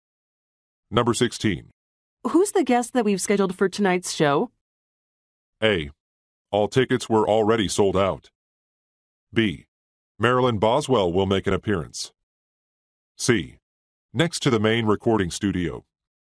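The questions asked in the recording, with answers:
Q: Who's the guest that we've scheduled for tonight's show?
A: B: Marilyn Boswell will make an appearance.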